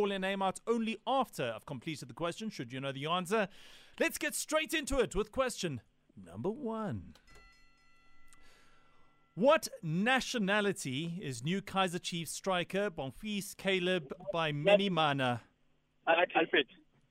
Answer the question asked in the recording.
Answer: Burundi is correct.